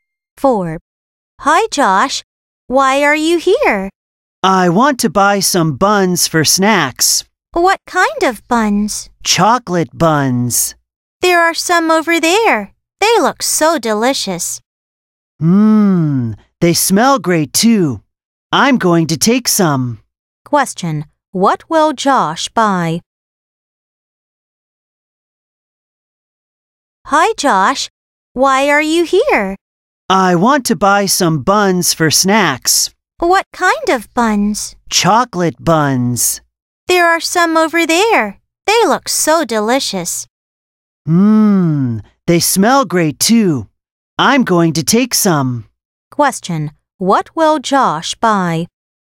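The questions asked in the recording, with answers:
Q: Question. What will Josh buy?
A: Chocolate buns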